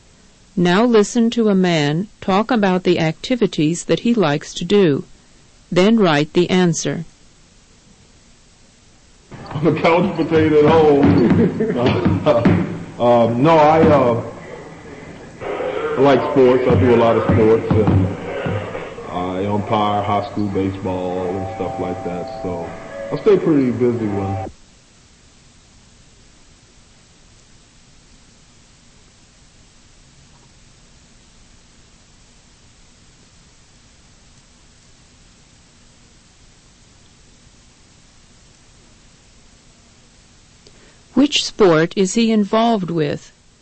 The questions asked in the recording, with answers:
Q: Which sport is he involved with?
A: The answer is baseball.